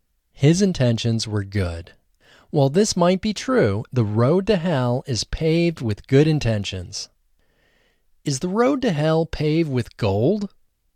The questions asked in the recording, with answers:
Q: Is the road to hell paved with gold?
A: No, the road to hell isn't paved with gold. The road to hell is paved with good intentions.